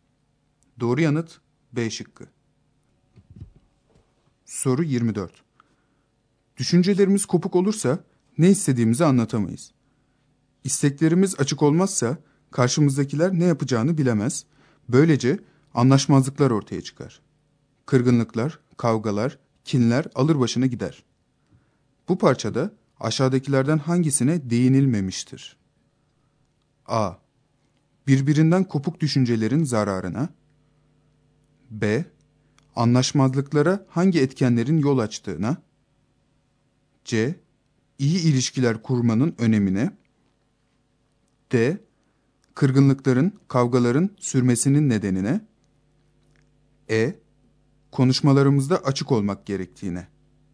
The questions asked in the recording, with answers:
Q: Bu parçada aşağıdakilerden hangisine değinilmemiştir?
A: Doğru yanıt C şıkkı.